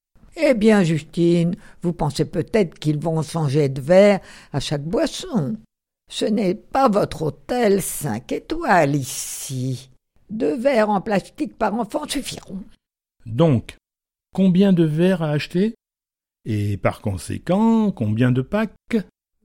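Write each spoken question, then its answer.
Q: Donc, combien de verres à acheter ?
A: 16 verres

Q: Et par conséquent, combien de packs ?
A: 2 packs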